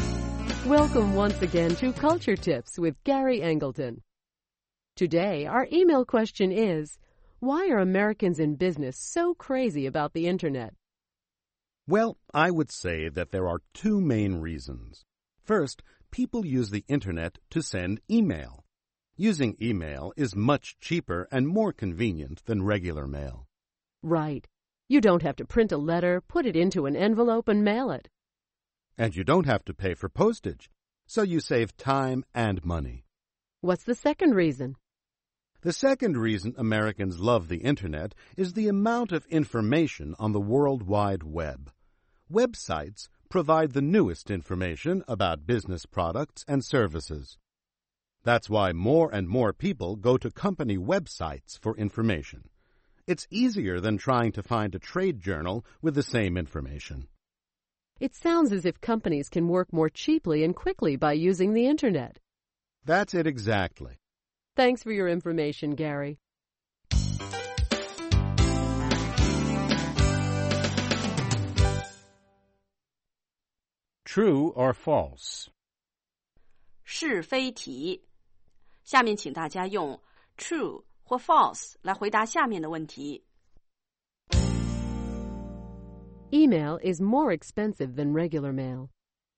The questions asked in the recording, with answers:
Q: Email is more expensive than regular mail.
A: False. With email, you save a lot of money on paper, envelopes, and postage.